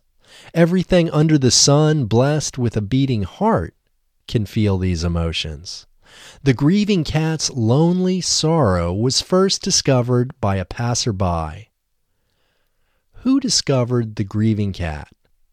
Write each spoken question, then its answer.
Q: Who discovered the grieving cat?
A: The grieving cat was discovered by a passerby.